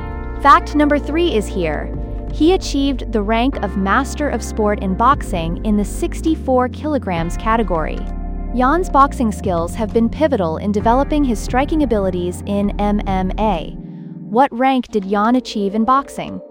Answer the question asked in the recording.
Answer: Correct answer, Master of Sport.